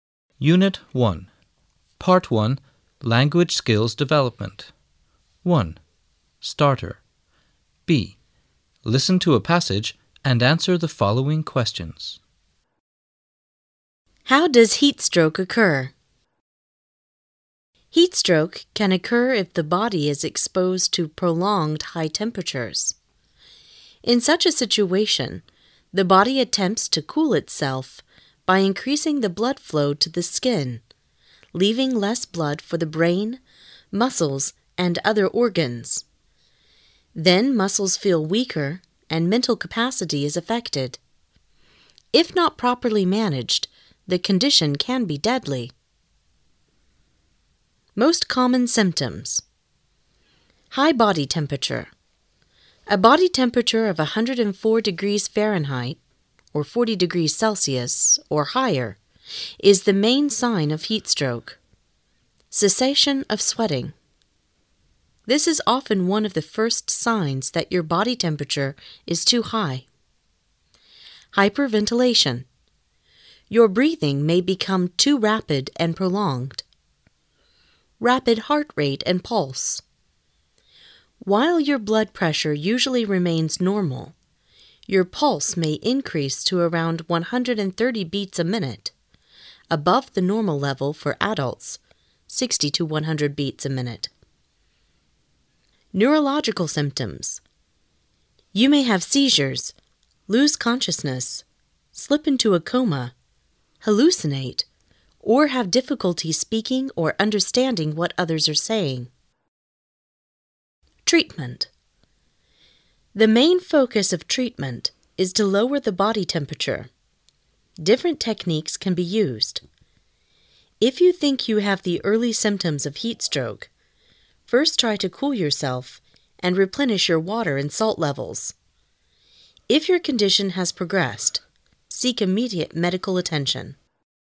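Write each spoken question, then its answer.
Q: How does heat stroke occur?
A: It can occur when the body is exposed to high temperatures for a long time.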